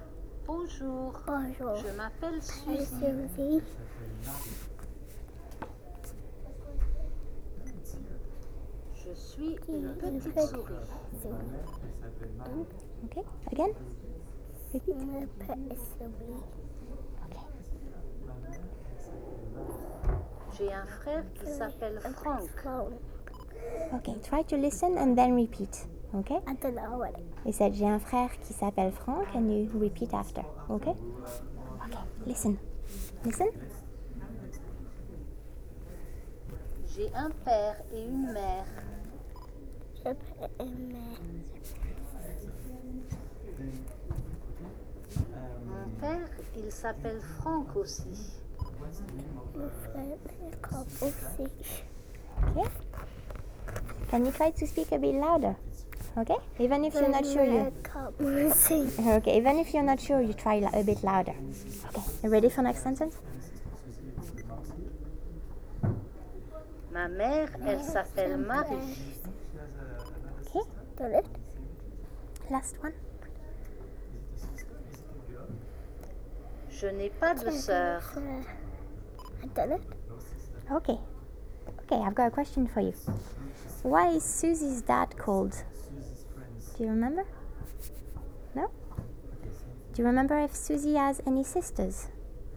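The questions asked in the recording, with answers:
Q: Why is Susie's dad called?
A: Frank

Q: Do you remember if Susie has any sisters?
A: No, she has no sister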